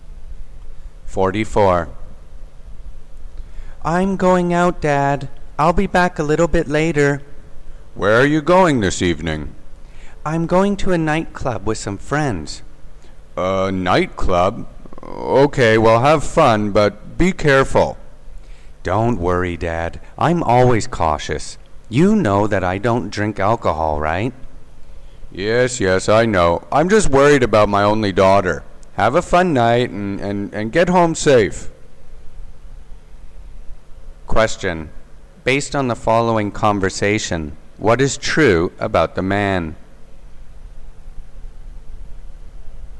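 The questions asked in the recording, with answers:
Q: Based on the following conversation, what is true about the man?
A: He is the father of an only daughter and worries about her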